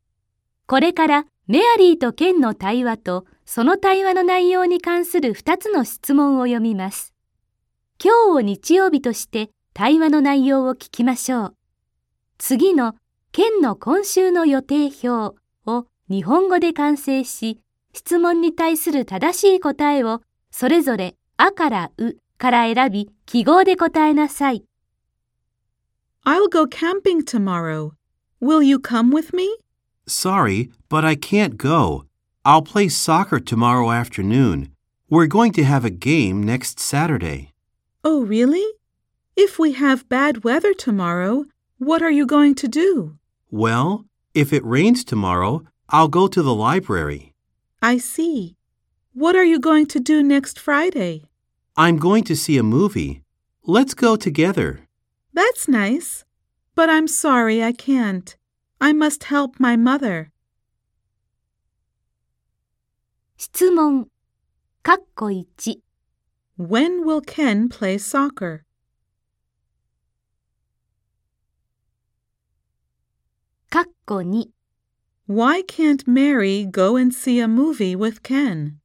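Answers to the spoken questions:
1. Tomorrow afternoon (Monday afternoon).
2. Because she must help her mother.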